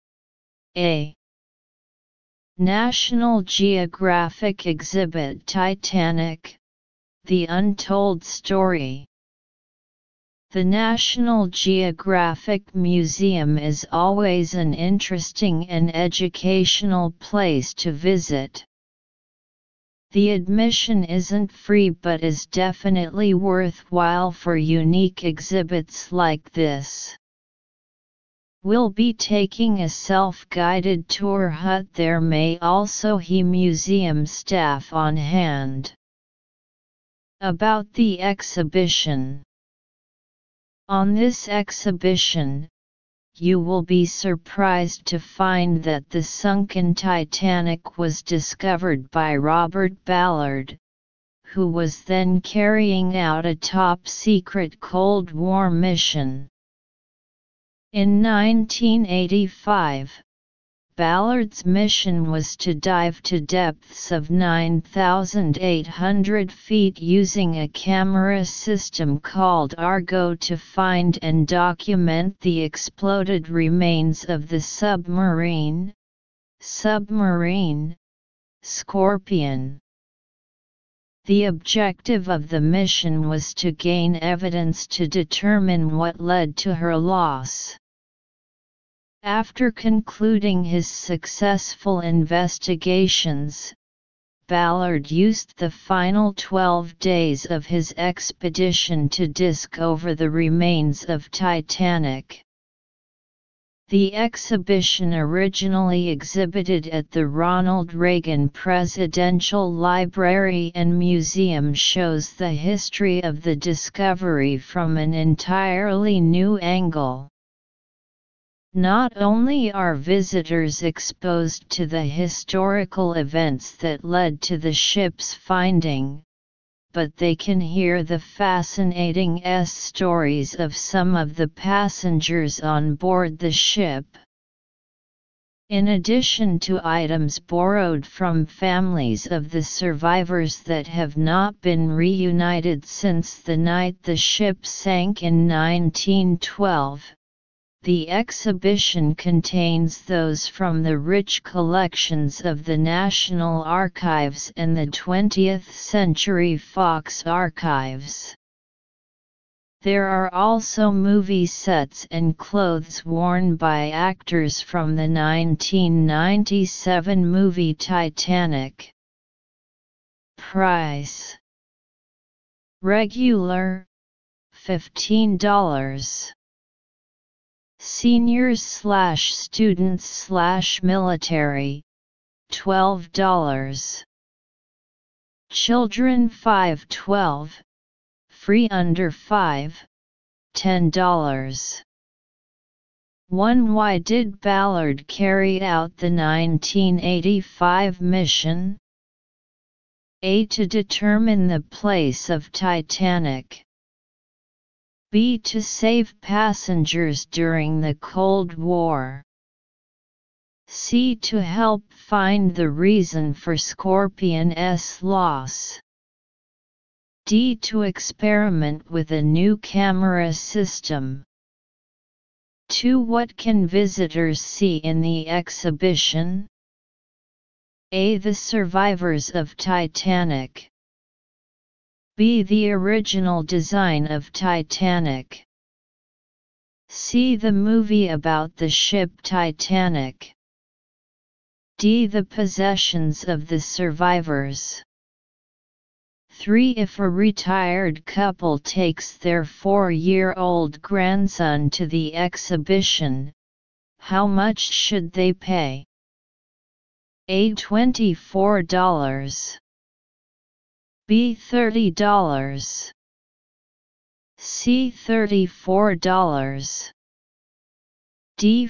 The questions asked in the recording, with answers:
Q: Why did Ballard carry out the 1985 mission?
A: Answer 1. C.

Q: What can visitors see in the exhibition?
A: 2. D.